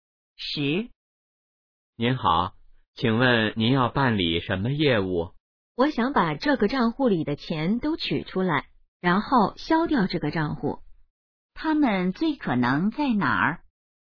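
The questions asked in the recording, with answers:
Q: 他们最可能在哪儿?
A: 银行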